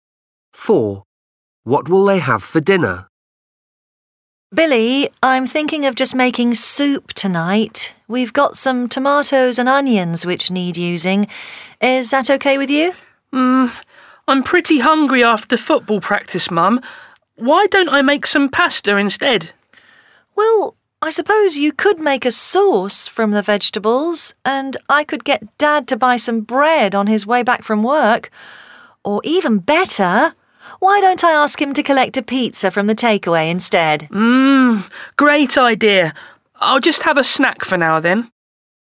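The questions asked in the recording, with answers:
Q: What will they have for dinner?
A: takeaway pizza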